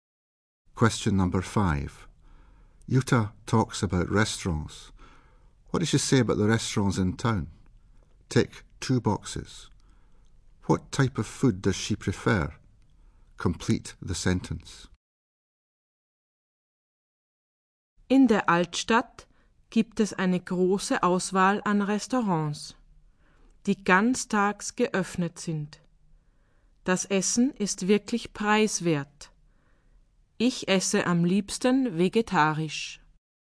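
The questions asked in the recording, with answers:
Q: What type of food does she prefer?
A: Vegetarian food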